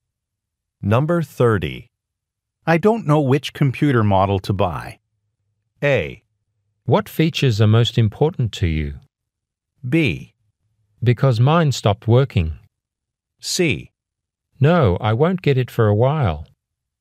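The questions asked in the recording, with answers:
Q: I don't know which computer model to buy.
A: A: What features are most important to you?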